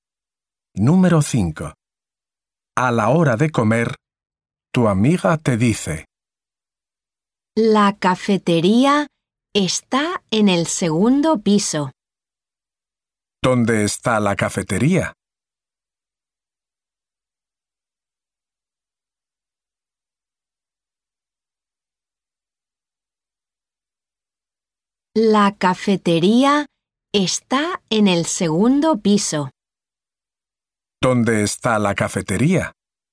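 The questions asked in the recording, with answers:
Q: ¿Dónde está la cafetería?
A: En el segundo piso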